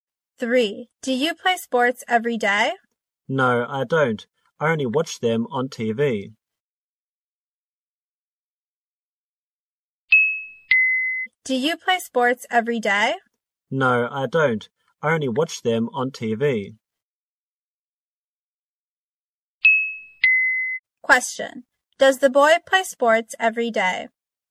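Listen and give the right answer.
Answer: No, he doesn't.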